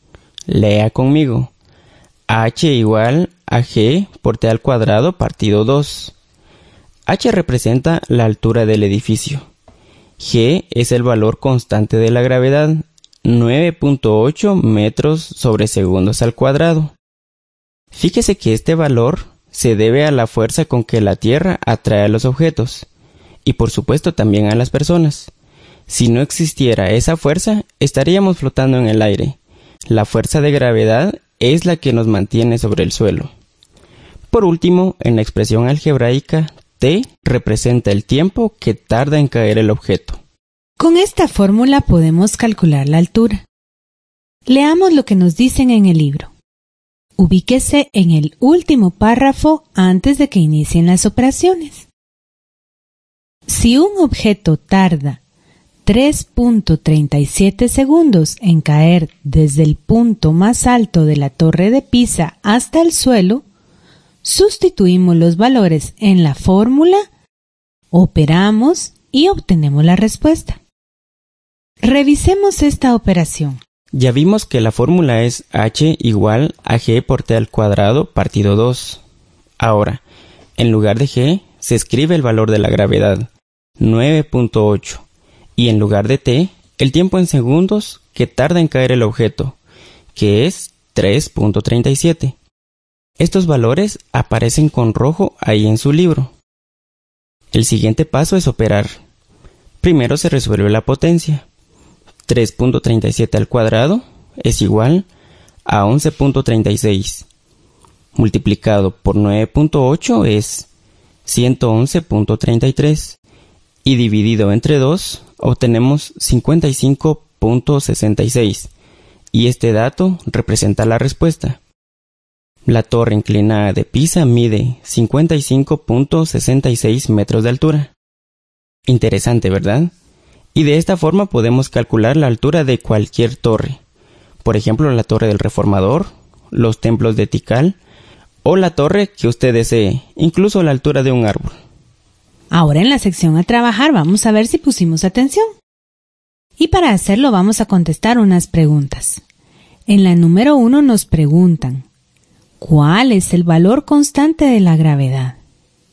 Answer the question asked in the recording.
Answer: 9.8 metros partido segundo al cuadrado.